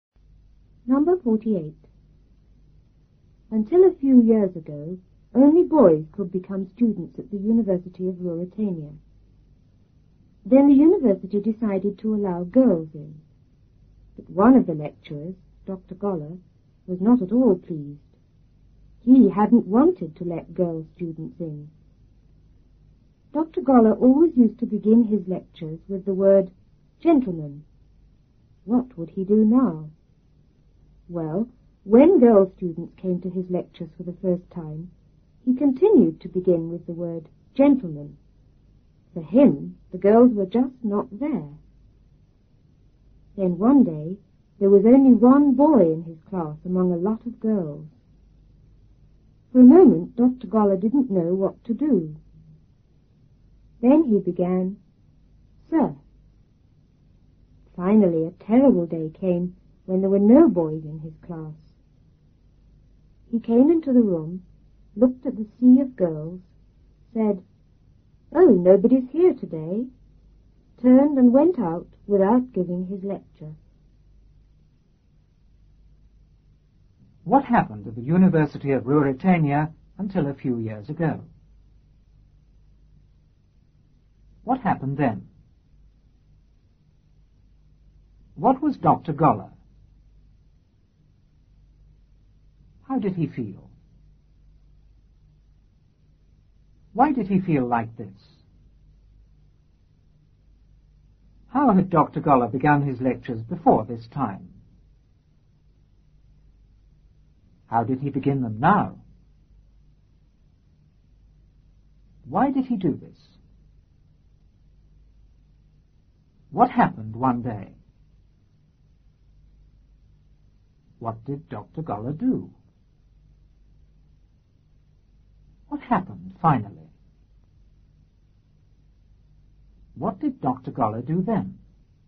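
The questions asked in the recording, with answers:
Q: What happened at the University of Ruritania until a few years ago?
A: Only boys could become students there.

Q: What happened then?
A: The university decided to allow girls in.

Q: What was Dr. Goller?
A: A lecturer at the university.

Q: How did he feel?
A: He was not at all pleased.

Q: Why did he feel like this?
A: He hadn't wanted to let girl students in.

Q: How had Dr. Goller begun his lectures before this time?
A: With the word "gentlemen".

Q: How did he begin them now?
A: He still began with "gentlemen".

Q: Why did he do this?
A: For him, the girls were just not there.

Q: What happened one day?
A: There was only one boy in his class among a lot of girls.

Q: What did Dr. Goller do?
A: He began with "sir".

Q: What happened finally?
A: There were no boys in his class.

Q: What did Dr. Goller do then?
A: He said nobody was there and left without giving his lecture.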